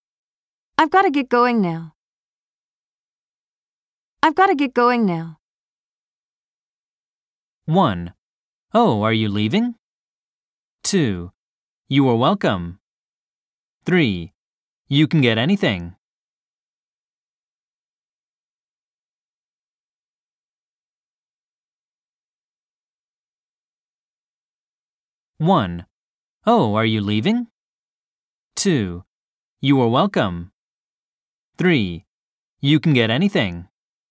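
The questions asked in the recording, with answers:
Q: I've got to get going now.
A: 1: Oh, are you leaving?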